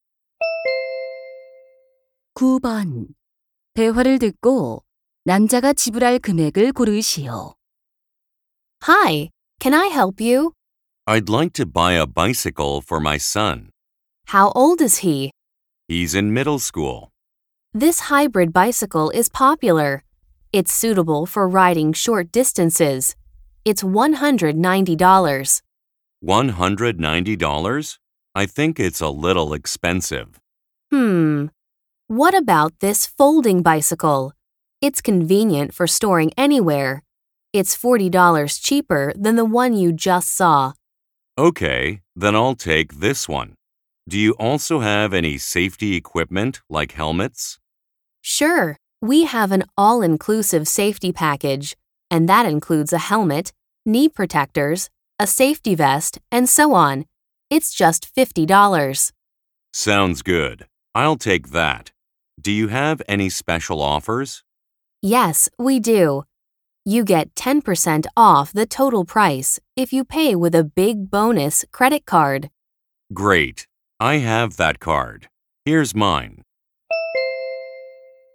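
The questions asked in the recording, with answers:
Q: 대화를 듣고 남자가 지불할 금액을 고르시오.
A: $180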